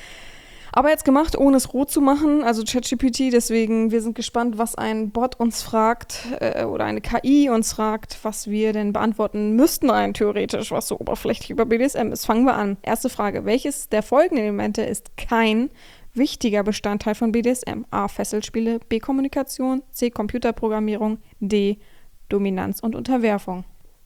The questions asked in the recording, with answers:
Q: welches der folgenden Elemente ist kein wichtiger Bestandteil von BDSM?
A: Antwort Nummer 1, C, Computerprogrammierung, ist richtig.